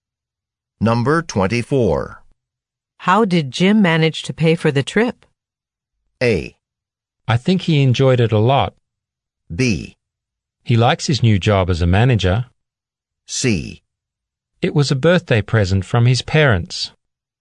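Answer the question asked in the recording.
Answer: C: It was a birthday present from his parents.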